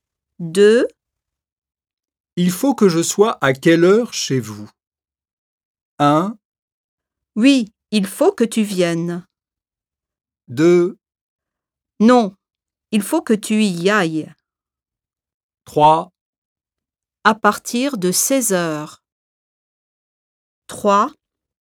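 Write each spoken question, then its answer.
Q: Il faut que je sois à quelle heure chez vous?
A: 3: À partir de 16 heures.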